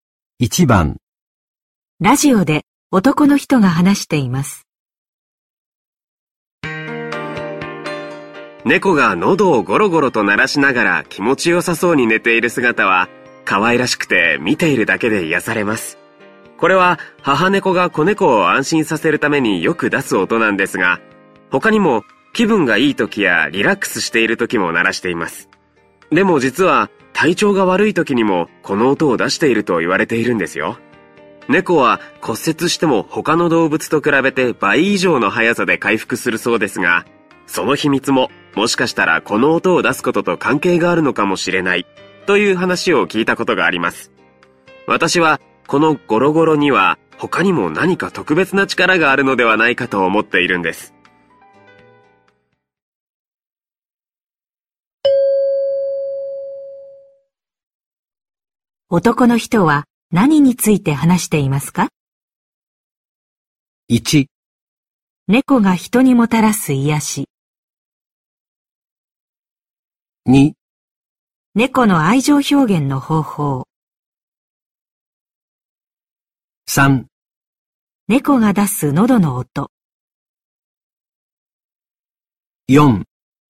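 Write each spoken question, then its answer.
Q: 男の人は何について話していますか?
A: 3: 猫が出す喉の音。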